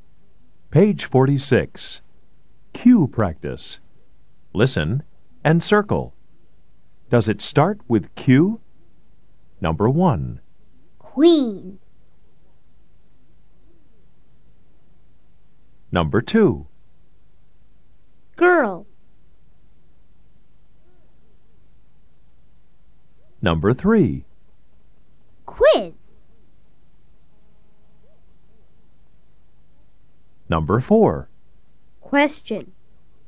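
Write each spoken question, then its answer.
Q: Queen.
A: Yes

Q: Girl.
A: No

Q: Quiz.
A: Yes

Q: Question.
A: Yes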